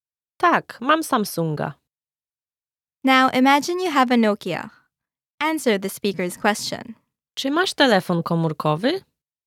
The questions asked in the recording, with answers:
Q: Czy masz telefon komórkowy?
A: Tak, mam Nokia.